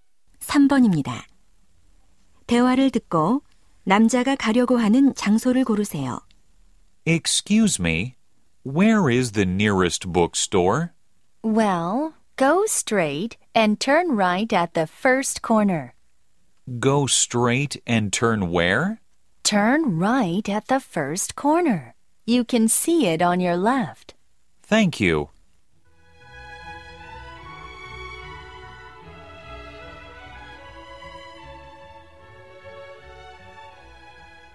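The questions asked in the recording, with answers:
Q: 대화를 듣고 남자가 가려고 하는 장소를 고르세요.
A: 서점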